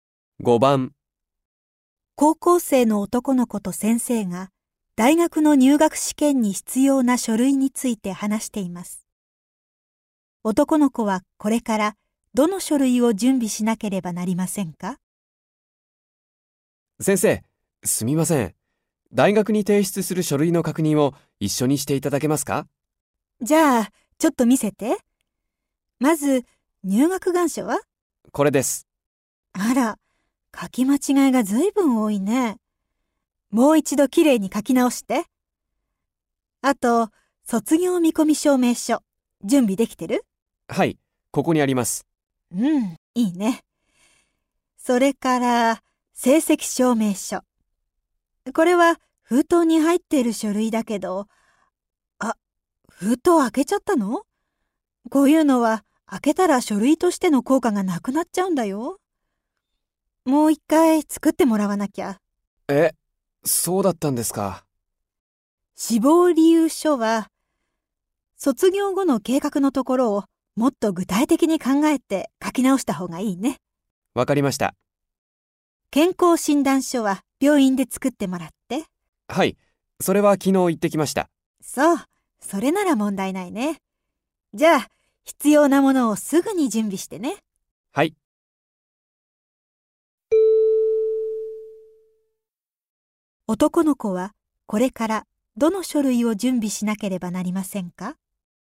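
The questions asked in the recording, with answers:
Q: 男の子はこれからどの書類を準備しなければなりませんか?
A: 入学願書、成績証明書、志望理由書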